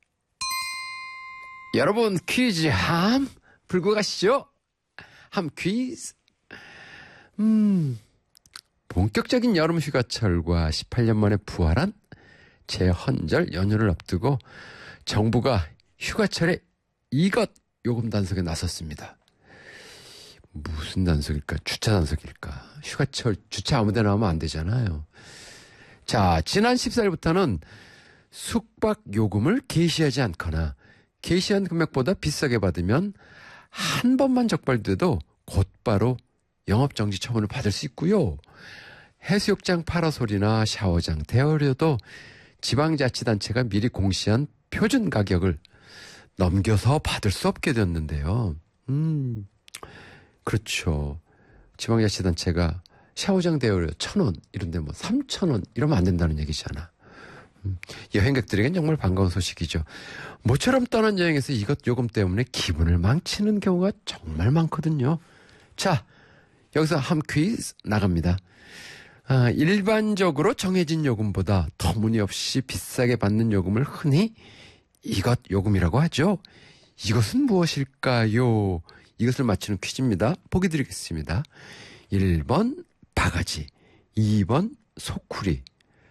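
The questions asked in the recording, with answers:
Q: 이것은 무엇일까요?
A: 1: 바가지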